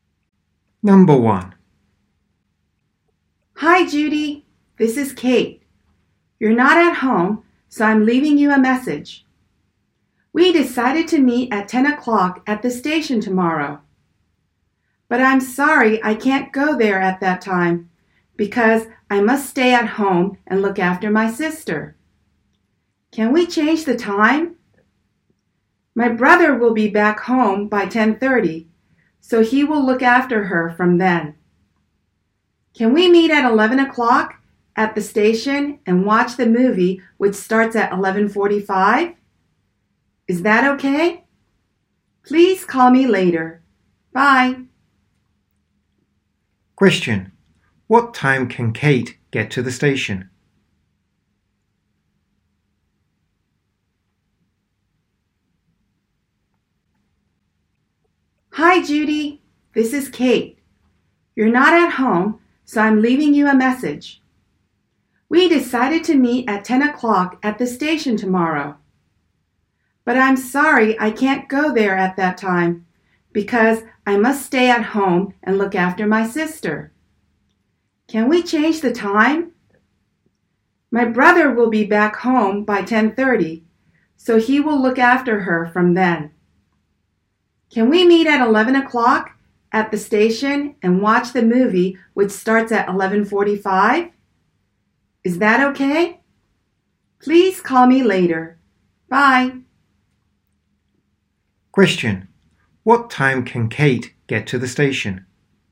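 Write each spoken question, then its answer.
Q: What time can Kate get to the station?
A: At 11 o'clock.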